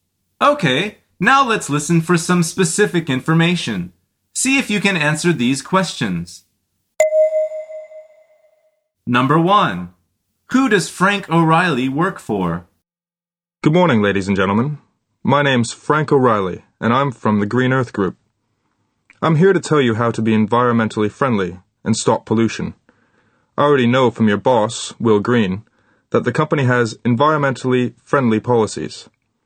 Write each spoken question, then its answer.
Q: Who does Frank O'Reilly work for?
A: The answer is the Green Earth Group.